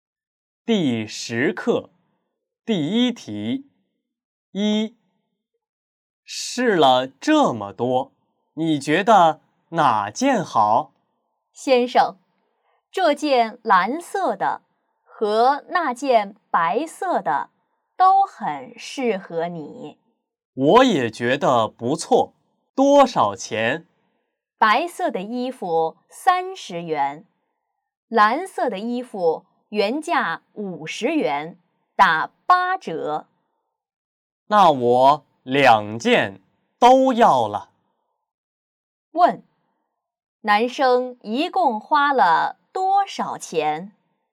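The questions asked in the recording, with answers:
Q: 问,男生一共花了多少钱?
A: 70元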